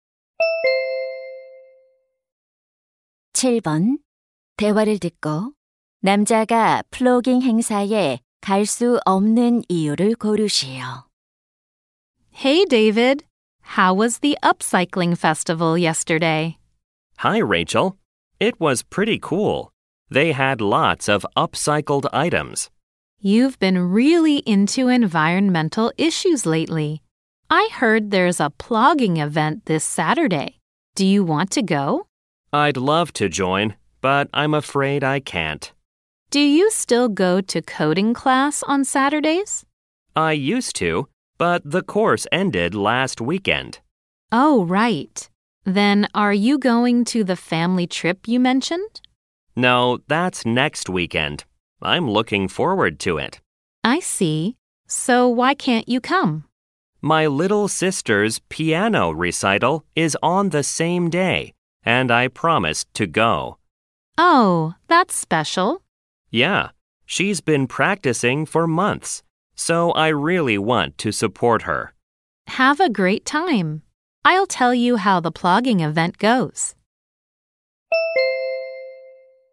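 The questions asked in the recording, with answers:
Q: 남자가 플로깅 행사에 갈 수 없는 이유를 고르시오.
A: 여동생의 피아노 연주회에 가야 해서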